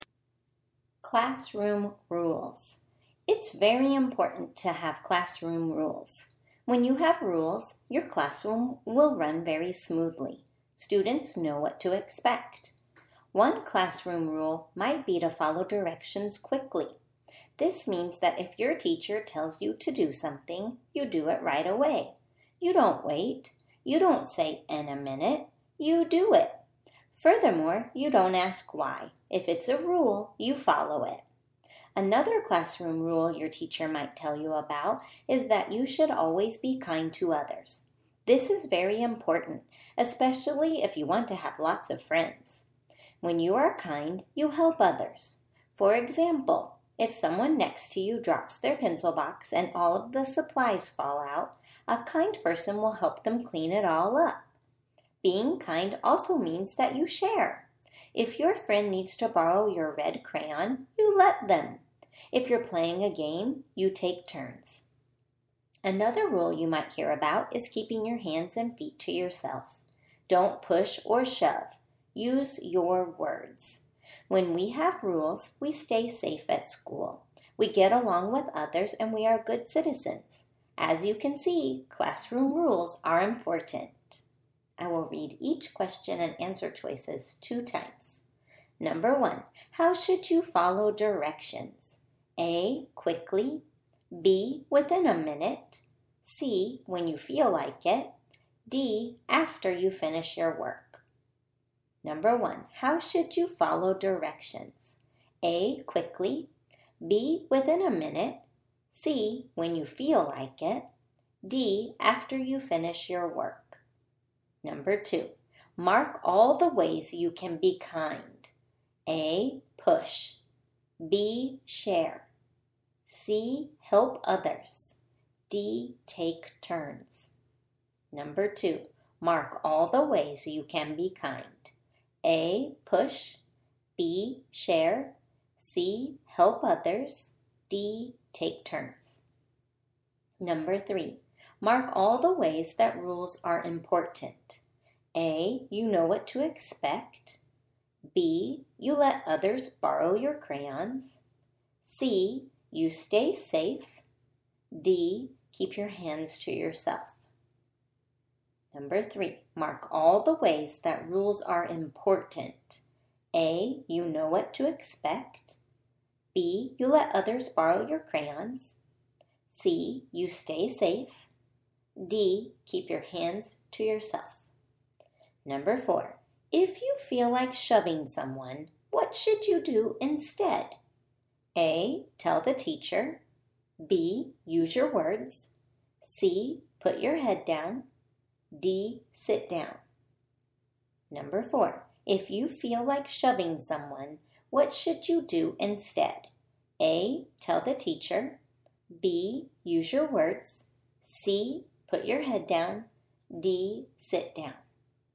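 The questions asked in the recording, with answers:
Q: how should you follow directions?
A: A: quickly

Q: mark all the ways you can be kind.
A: B: share, C: help others, D: take turns

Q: mark all the ways that rules are important.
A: A: you know what to expect, C: you stay safe

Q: if you feel like shoving someone, what should you do instead?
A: B: use your words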